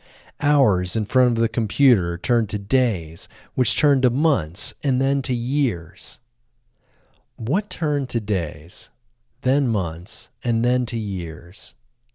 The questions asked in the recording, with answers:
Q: What turned to days, then months, and then to years?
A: Hours in front of the computer turned to days, then months, and then to years.